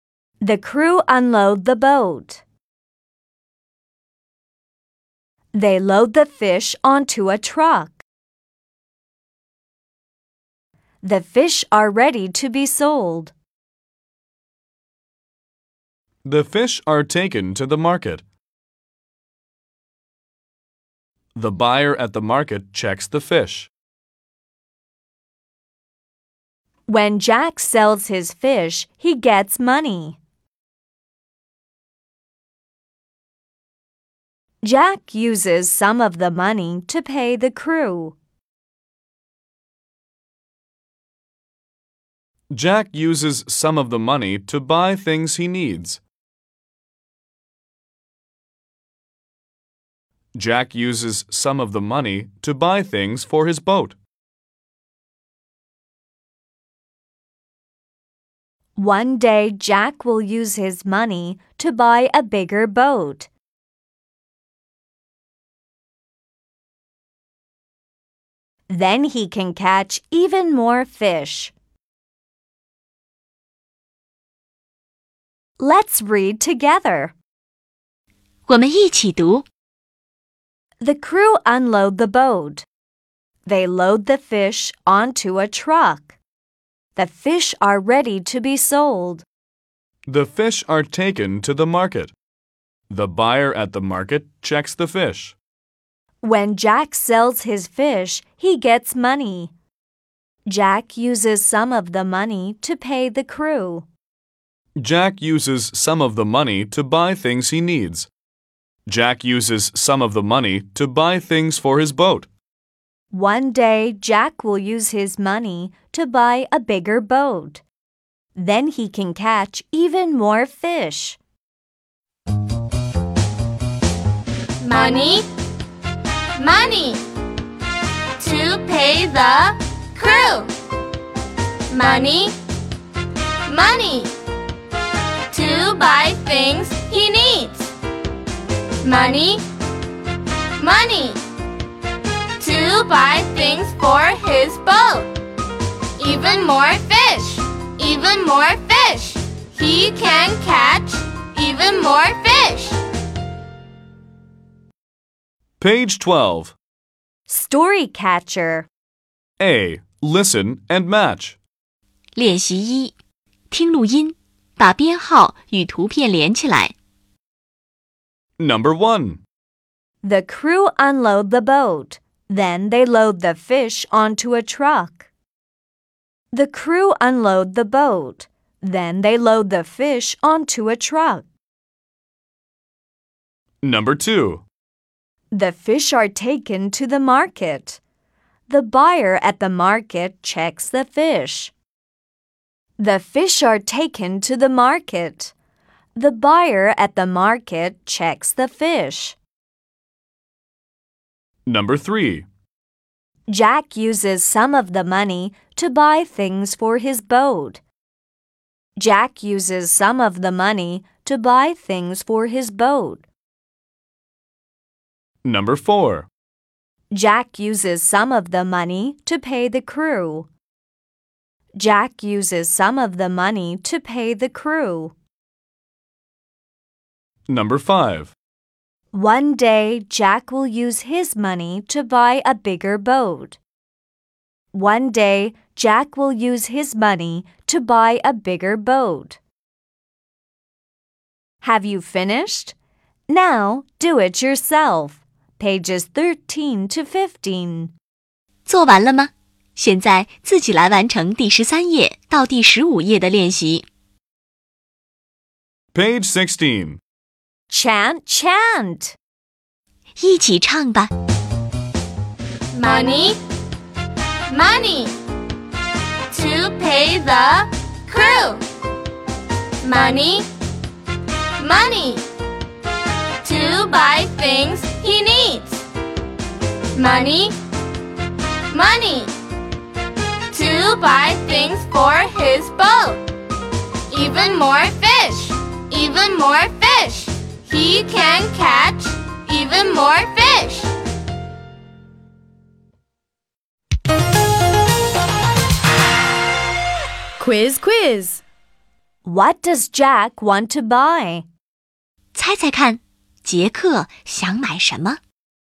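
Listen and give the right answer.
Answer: A bigger boat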